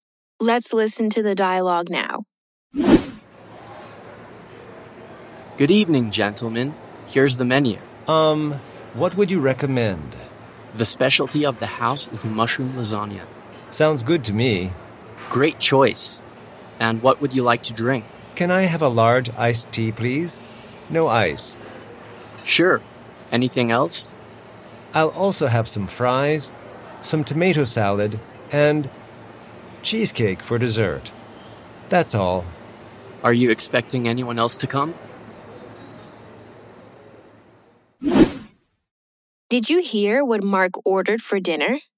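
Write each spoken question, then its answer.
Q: Did you hear what Mark ordered for dinner?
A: Mushroom lasagna, a large iced tea with no ice, fries, tomato salad, and cheesecake for dessert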